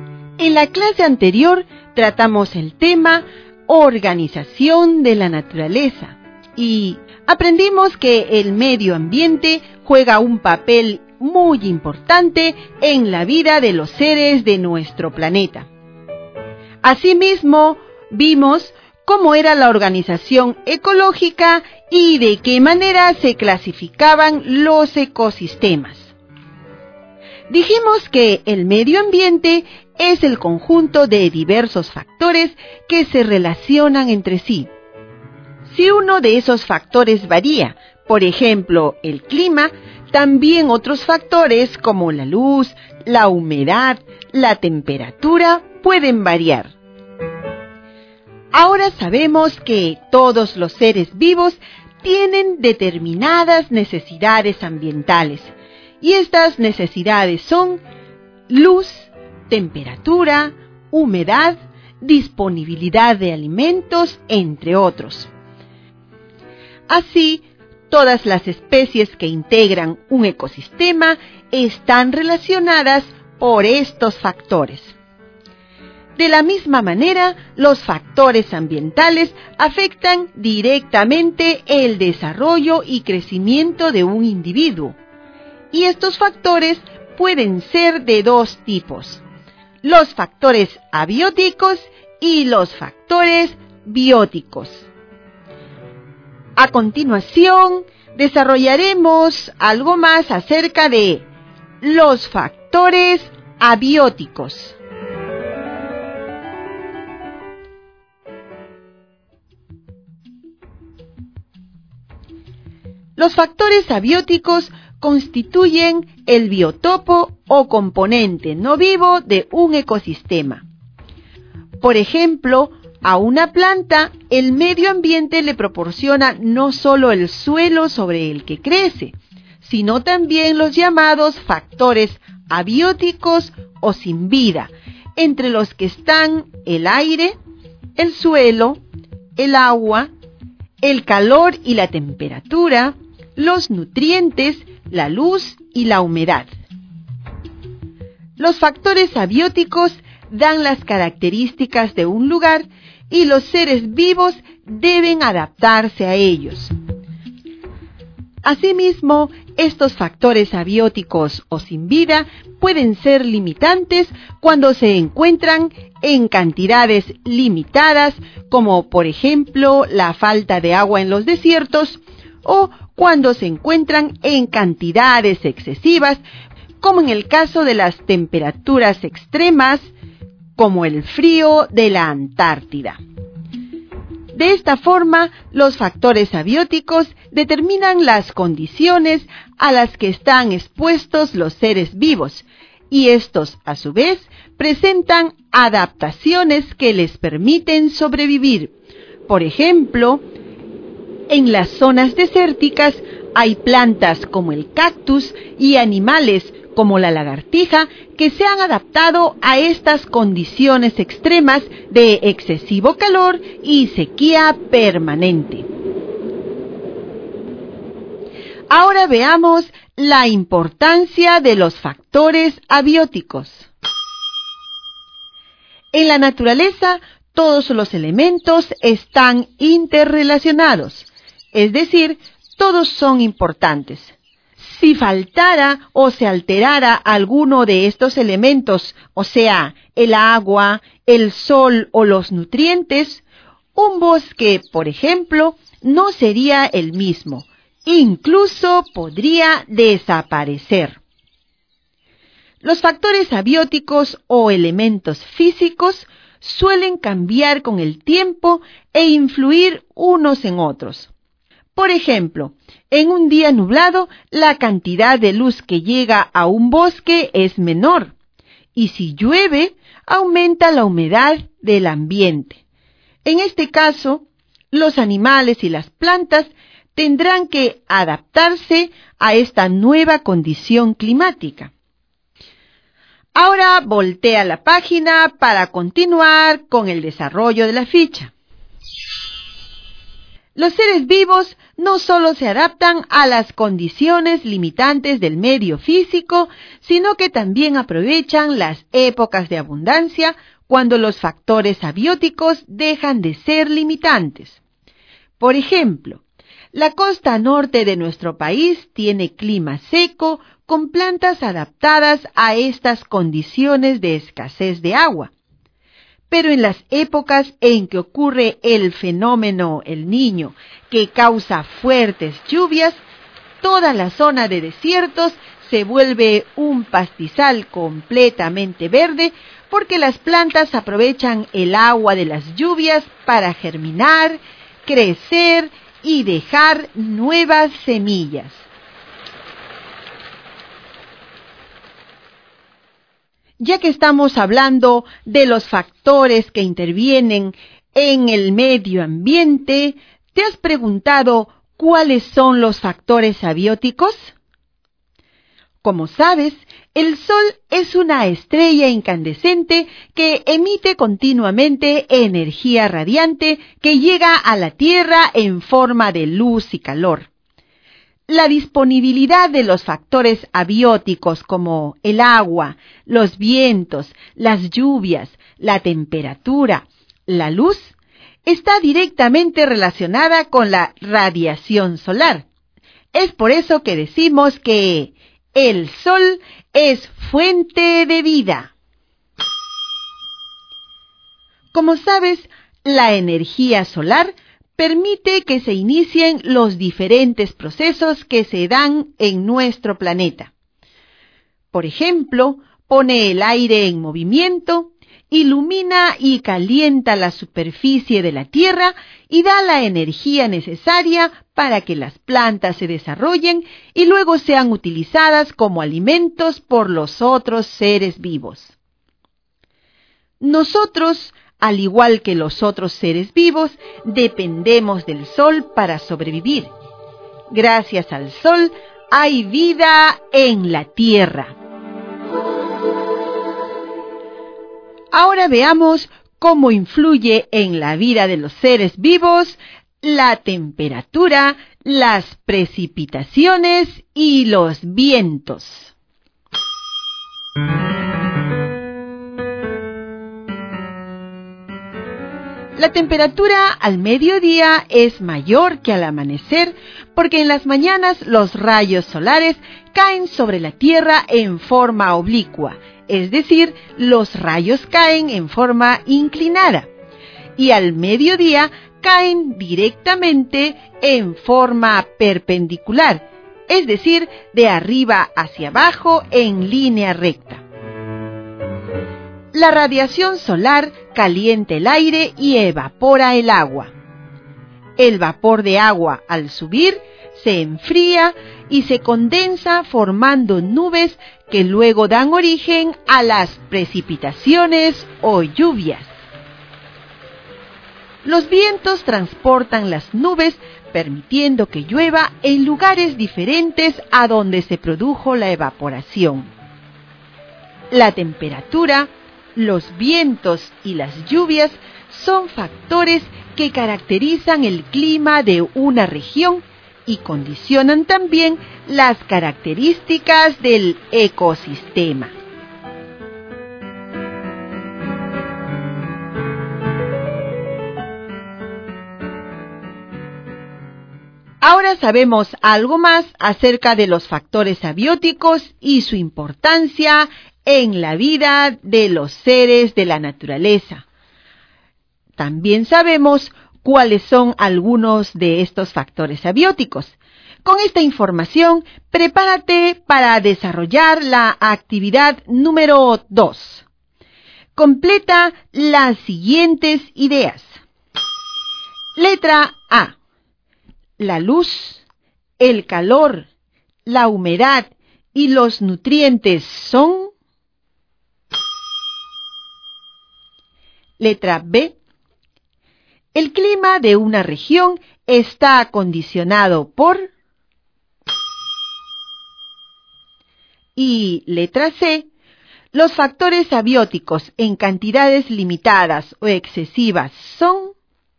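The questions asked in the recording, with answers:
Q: La luz, el calor, la humedad y los nutrientes son...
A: factores abióticos

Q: El clima de una región está condicionado por...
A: la temperatura, los vientos y las lluvias

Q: Los factores abióticos en cantidades limitadas o excesivas son...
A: limitantes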